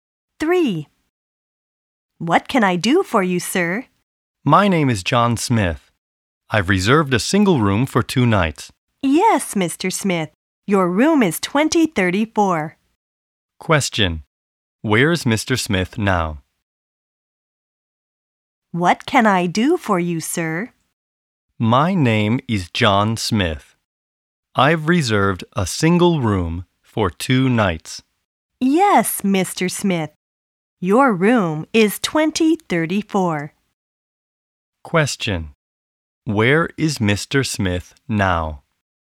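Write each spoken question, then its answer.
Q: Where is Mr. Smith now?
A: At a hotel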